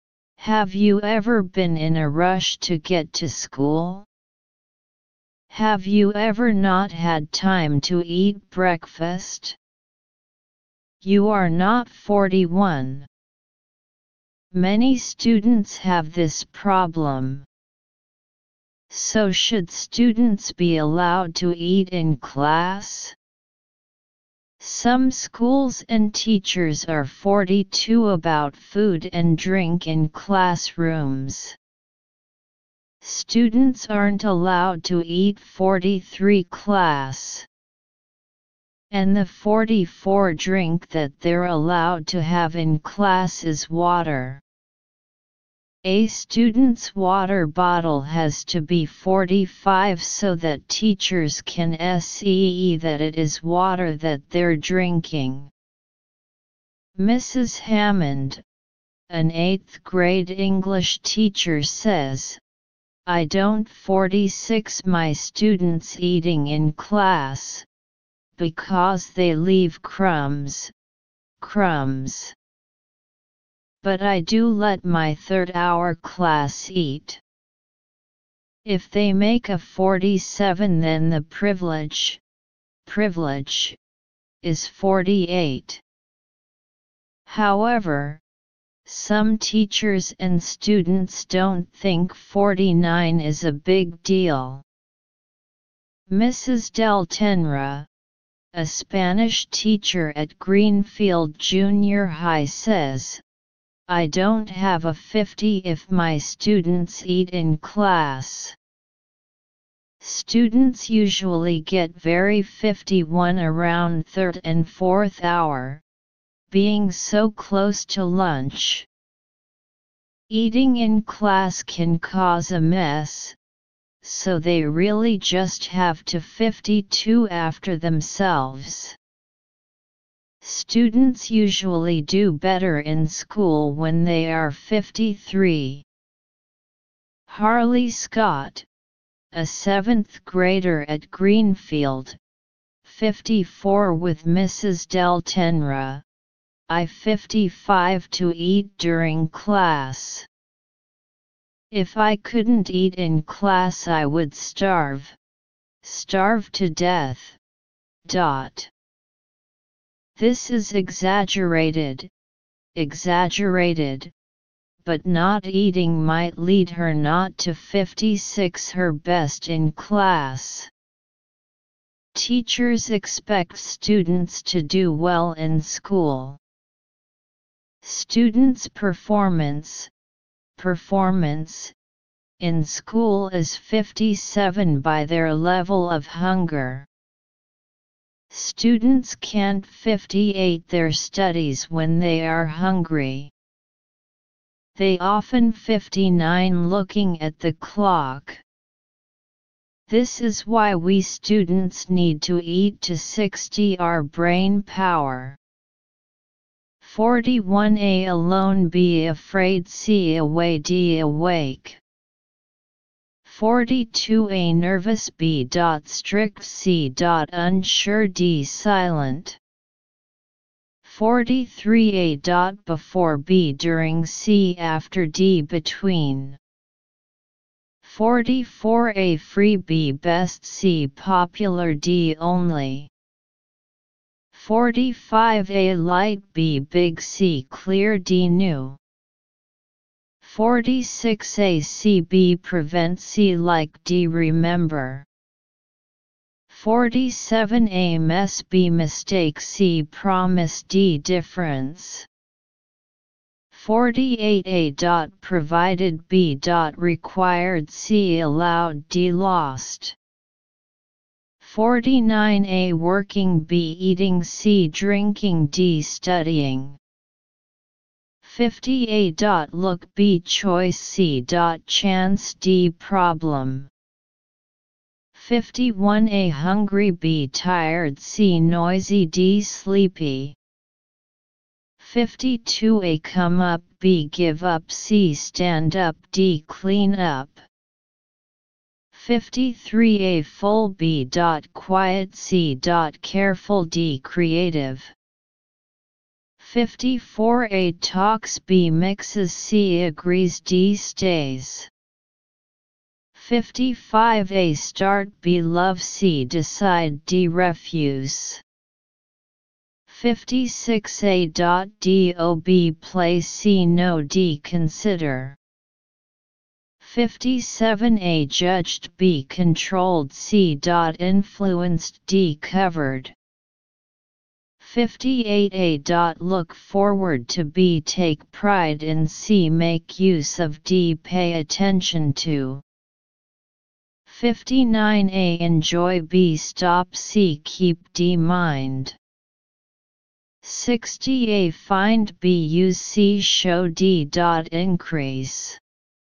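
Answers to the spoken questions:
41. A: alone
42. B: strict
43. B: during
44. D: only
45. C: clear
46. C: like
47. A: mess
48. D: lost
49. B: eating
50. D: problem
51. A: hungry
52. D: clean up
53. A: full
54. C: agrees
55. B: love
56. A: do
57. C: influenced
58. D: pay attention to
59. C: keep
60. D: increase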